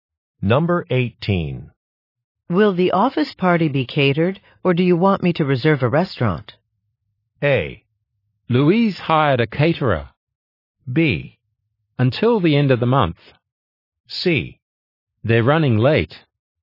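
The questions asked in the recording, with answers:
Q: Will the office party be catered, or do you want me to reserve a restaurant?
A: A: Louise hired a caterer.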